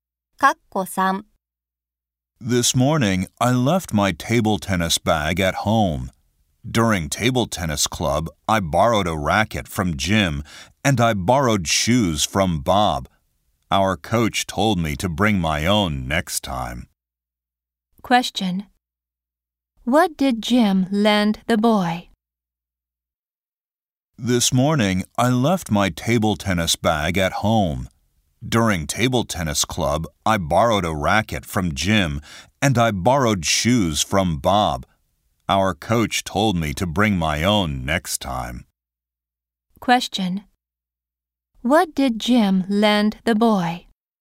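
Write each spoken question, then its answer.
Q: What did Jim lend the boy?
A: A racket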